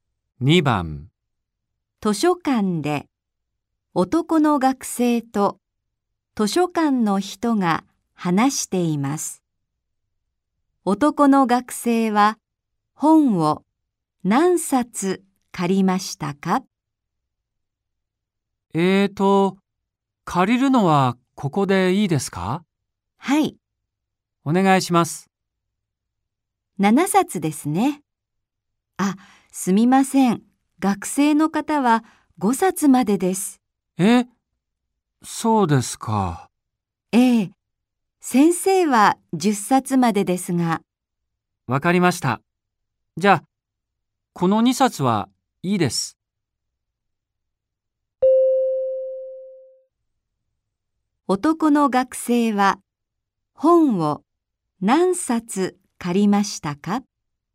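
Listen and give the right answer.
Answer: 5冊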